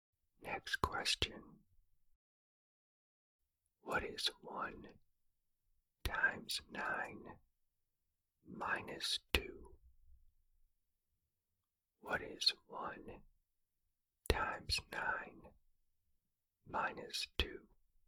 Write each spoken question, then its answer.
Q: What is 1 times 9 minus 2?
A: The answer is 7.